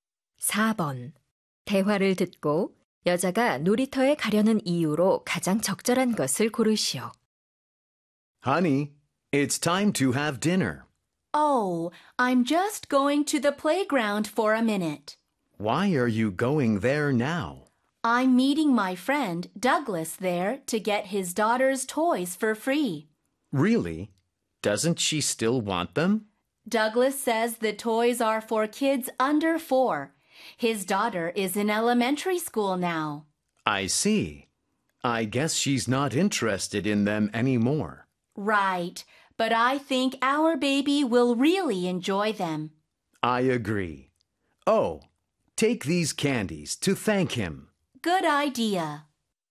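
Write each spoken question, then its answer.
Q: 대화를 듣고 여자가 놀이터에 가려는 이유로 가장 적절한 것을 고르시오.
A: 친구 Douglas에게서 딸의 장난감을 무료로 받으려고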